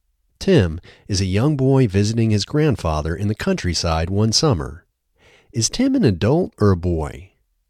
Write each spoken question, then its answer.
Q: Is Tim an adult or a boy?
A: Tim is a boy.